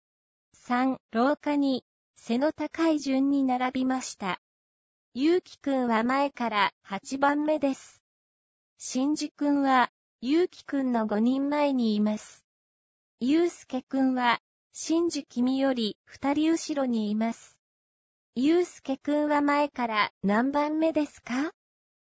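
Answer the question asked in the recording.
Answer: 5番目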